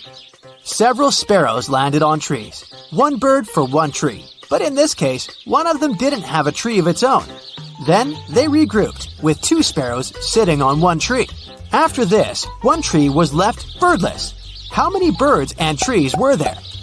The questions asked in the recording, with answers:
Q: How many birds and trees were there?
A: There were 4 sparrows and 3 trees.